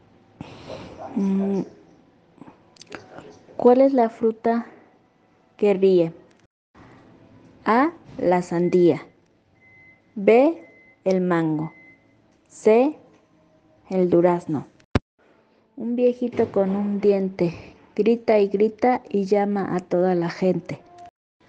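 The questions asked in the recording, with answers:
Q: ¿Cuál es la fruta que ríe?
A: A: La sandía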